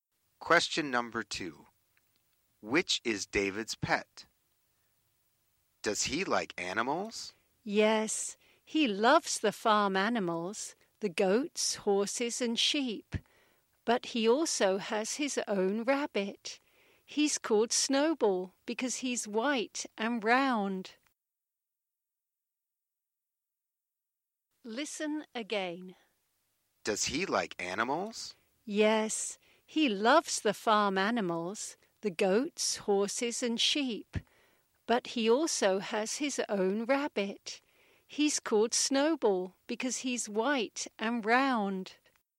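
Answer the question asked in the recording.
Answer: A white rabbit (Snowball)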